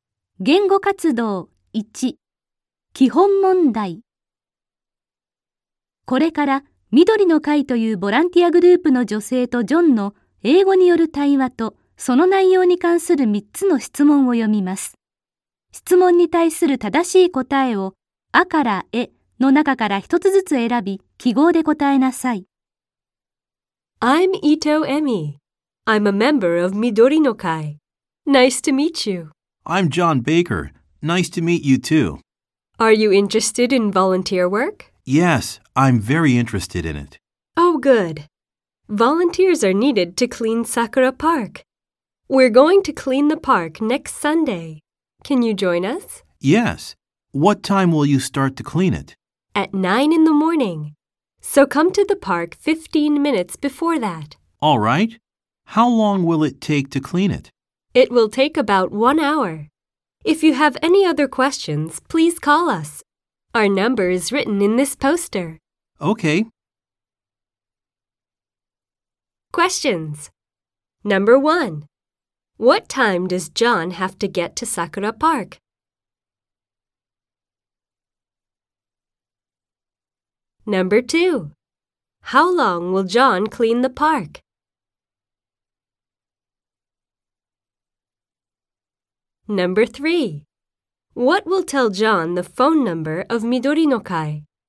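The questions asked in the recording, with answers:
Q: What time does John have to get to Sakura Park?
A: At 8:45 in the morning

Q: How long will John clean the park?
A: About one hour

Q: What will tell John the phone number of 緑の会?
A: The poster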